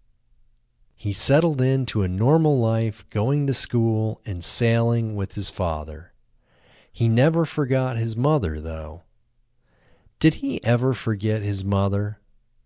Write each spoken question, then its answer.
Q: Did he ever forget his mother?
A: No, he never forgot his mother.